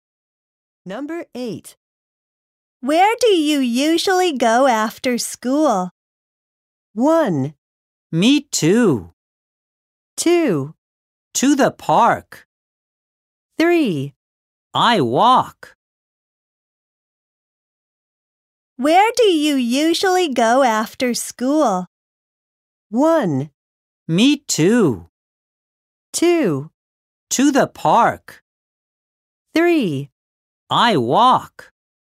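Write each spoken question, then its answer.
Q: Where do you usually go after school?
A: 2: To the park.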